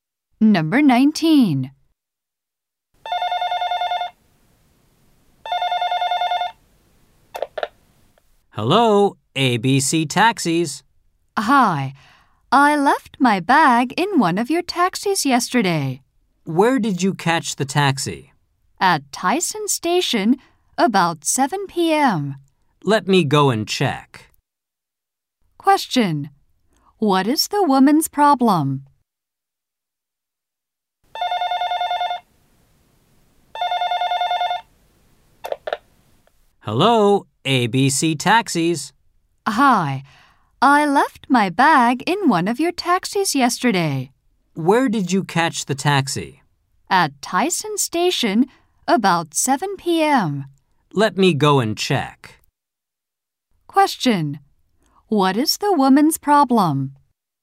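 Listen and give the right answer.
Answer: She left her bag in a taxi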